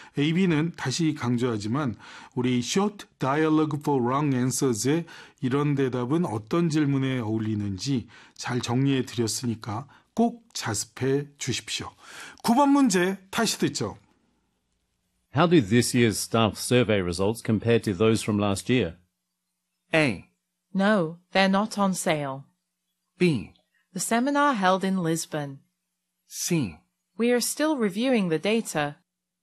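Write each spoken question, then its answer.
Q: How do this year's staff survey results compare to those from last year?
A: C: We are still reviewing the data.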